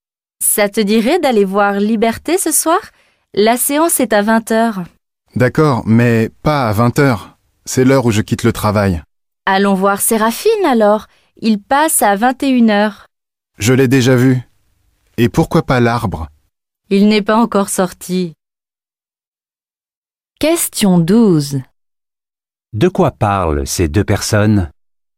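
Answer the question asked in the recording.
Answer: D'aller au cinéma ce soir (choisir un film et une séance)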